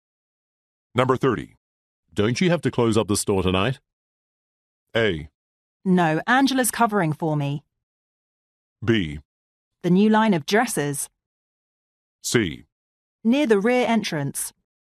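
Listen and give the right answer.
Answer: A: No, Angela's covering for me.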